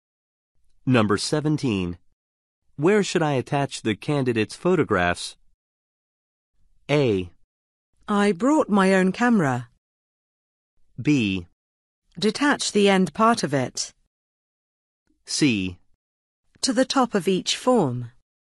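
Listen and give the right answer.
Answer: C: To the top of each form.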